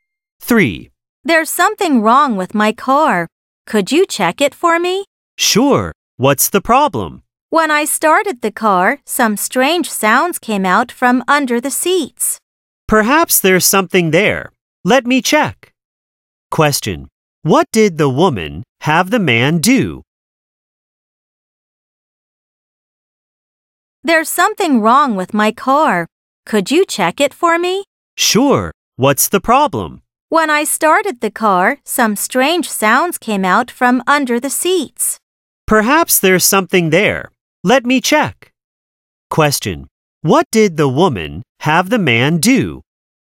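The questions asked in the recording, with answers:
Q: What did the woman have the man do?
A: Check her car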